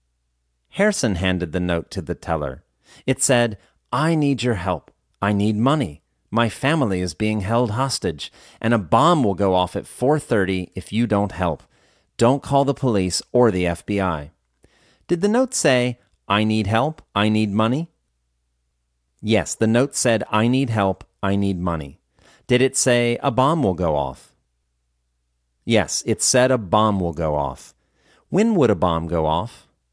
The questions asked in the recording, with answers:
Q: When would a bomb go off?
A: It would go off at 4:30.